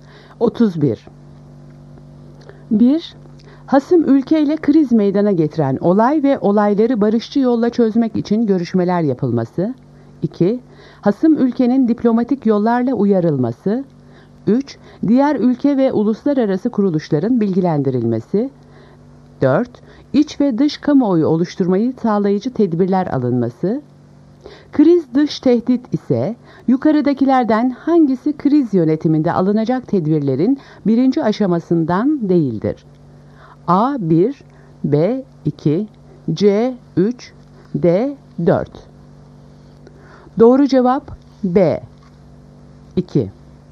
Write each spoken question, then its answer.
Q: Kriz dış tehdit ise yukarıdakilerden hangisi kriz yönetiminde alınacak tedbirlerin birinci aşamasından değildir?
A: Doğru cevap B 2.